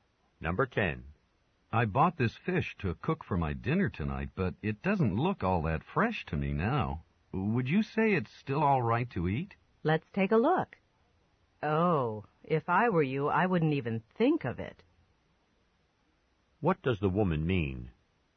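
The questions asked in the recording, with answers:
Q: What does the woman mean?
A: The fish shouldn't be eaten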